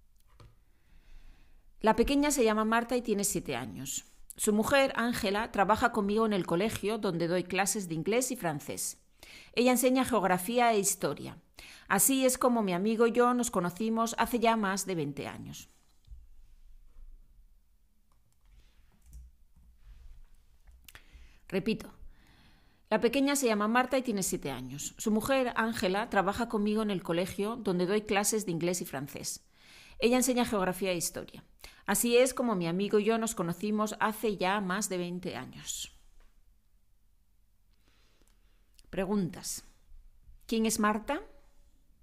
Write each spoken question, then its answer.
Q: ¿Quién es Marta?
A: Marta es la hija pequeña de mi amigo.